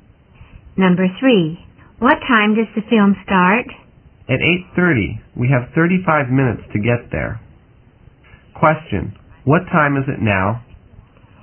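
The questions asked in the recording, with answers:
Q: What time is it now?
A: 7:55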